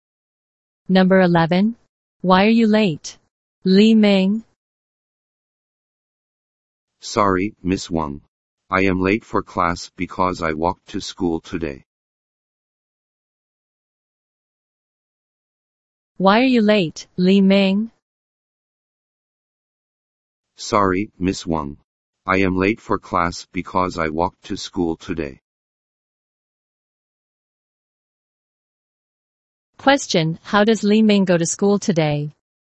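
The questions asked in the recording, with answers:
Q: Question, how does Li Ming go to school today?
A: He walked (on foot)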